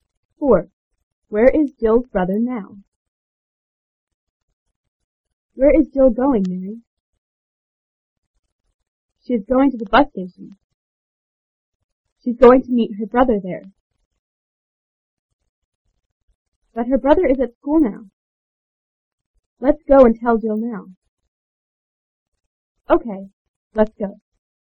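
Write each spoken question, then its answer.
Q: Where is Jill's brother now?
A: At school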